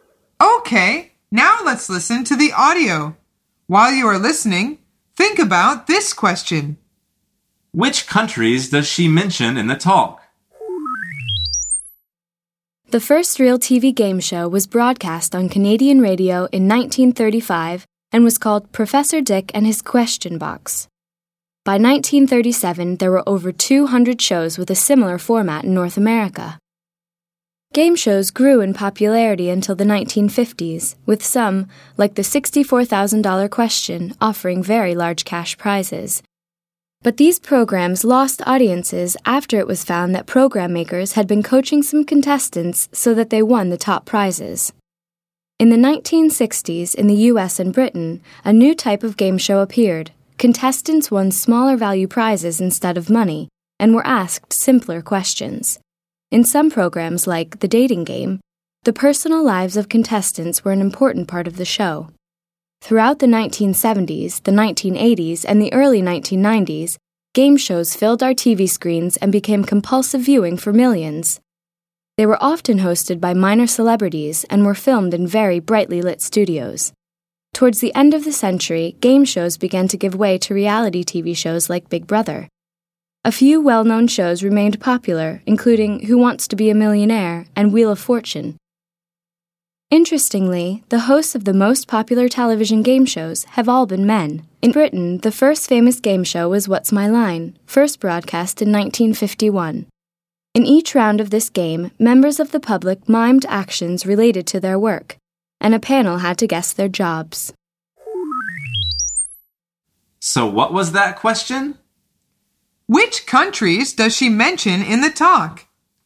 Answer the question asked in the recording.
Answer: The answer is Canada, the US, and Britain.